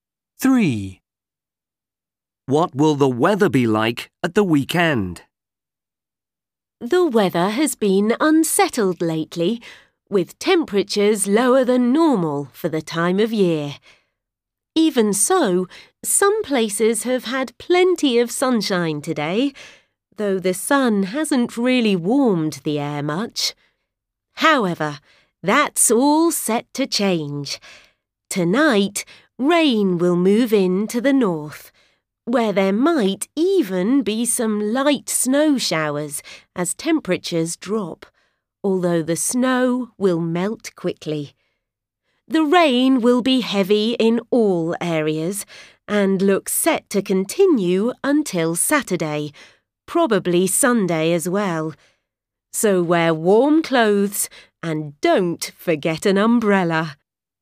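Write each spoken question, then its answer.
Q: What will the weather be like at the weekend?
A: Rainy (heavy rain)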